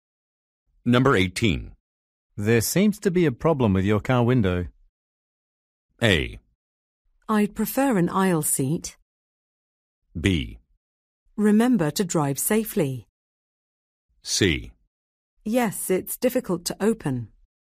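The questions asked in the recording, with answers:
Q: There seems to be a problem with your car window.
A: C: Yes, it's difficult to open.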